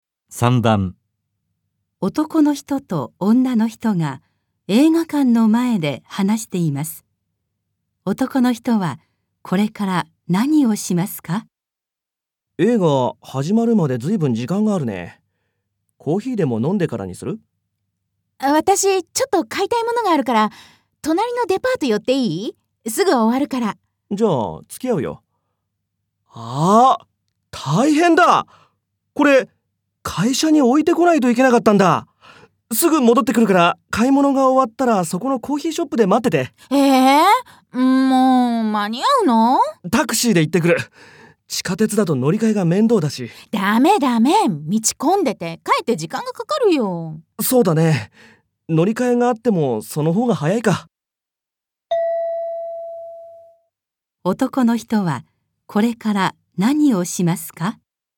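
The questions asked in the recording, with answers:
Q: 男の人はこれから何をしますか?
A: 地下鉄で会社に物を置きに行く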